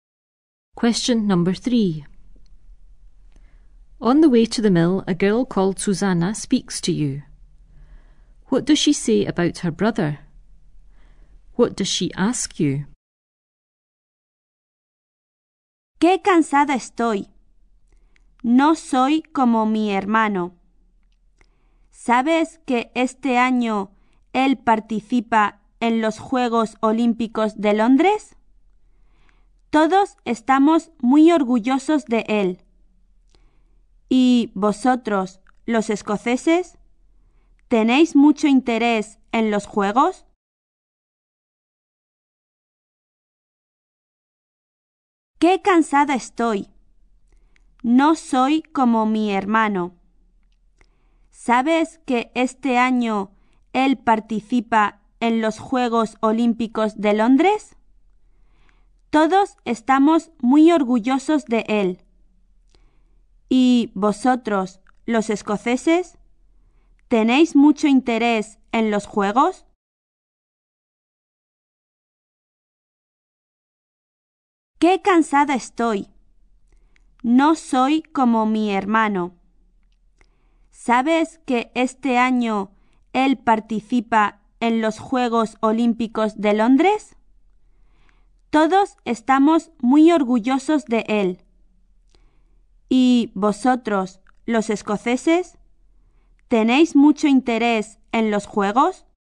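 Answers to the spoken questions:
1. He is taking part in the London Olympics this year and they are very proud of him
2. Whether Scottish people are very interested in the Games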